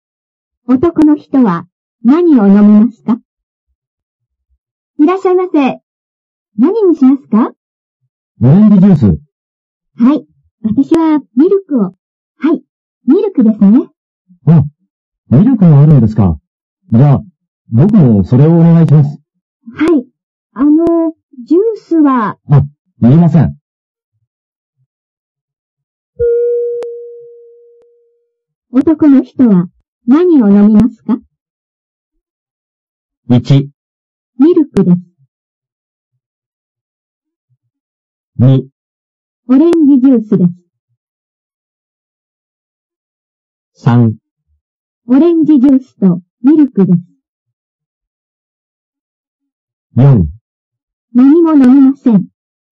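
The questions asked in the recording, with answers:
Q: 男の人は何を飲みますか?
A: 1: ミルクです。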